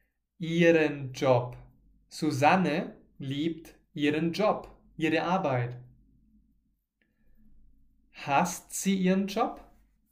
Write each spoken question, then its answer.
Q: Hasst sie ihren Job?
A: Nein, sie hasst nicht ihren Job.